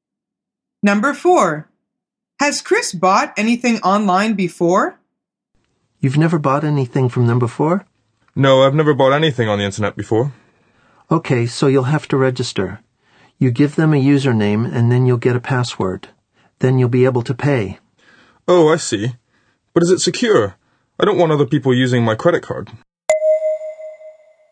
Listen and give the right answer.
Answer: The answer is no.